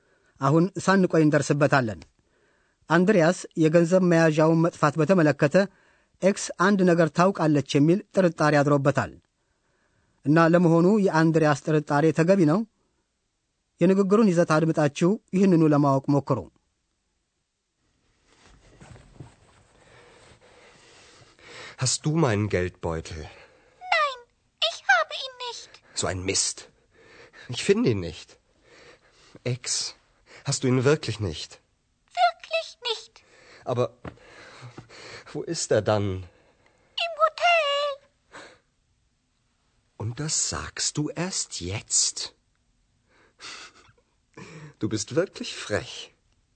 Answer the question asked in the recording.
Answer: እንደ እውነቱ ከሆነ ቦርሳው ኤክስ ዘንድ አይደለም፣ ግን አንድሪያስ ሆቴል ውስጥ እንደረሳው ኤክስ በሚገባ ተመልክታለች።